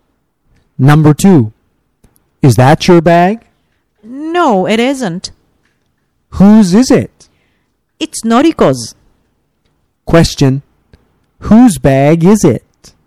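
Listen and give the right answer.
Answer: Noriko's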